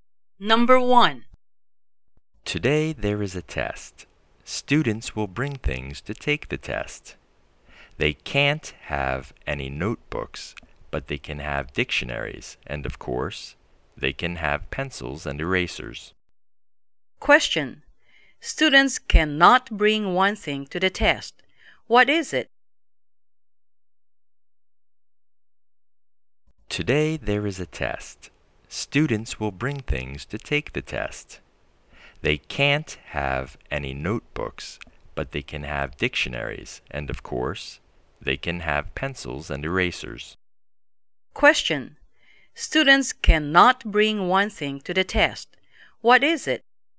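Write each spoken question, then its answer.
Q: Question. Students cannot bring one thing to the test. What is it?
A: Notebooks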